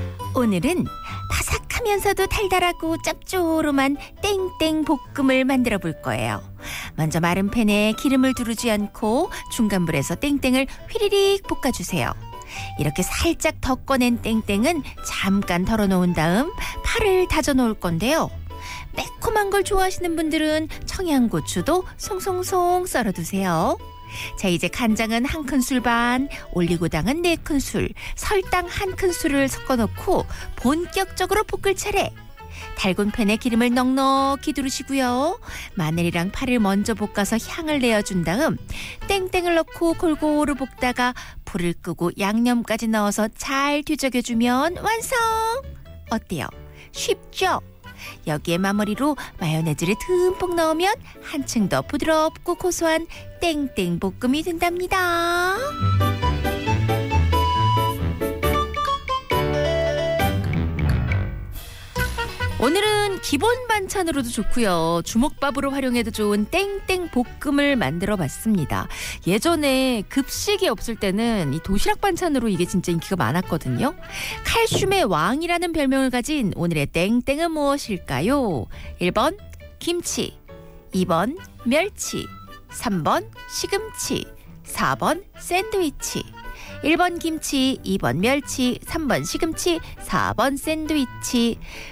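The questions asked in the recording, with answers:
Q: 칼슘의 왕이라는 별명을 가진 오늘의 땡땡은 무엇일까요?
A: 2: 멸치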